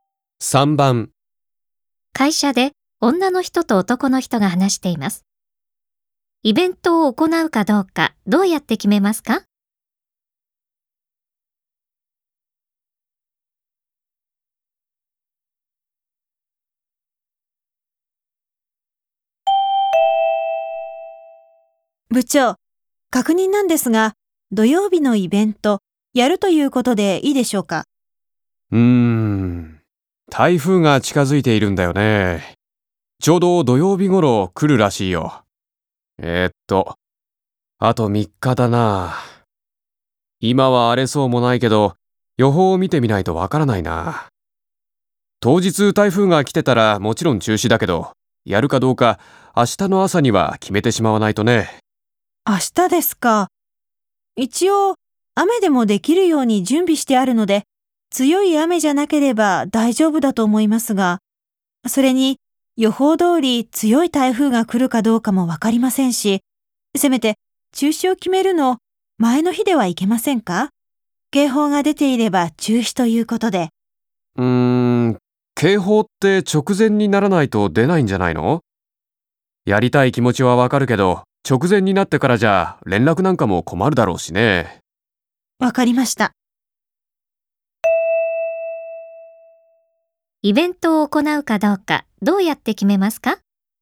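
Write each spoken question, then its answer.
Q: イベントを行うかどうかどうやって決めますか?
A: 明日の朝、天気予報を見て決める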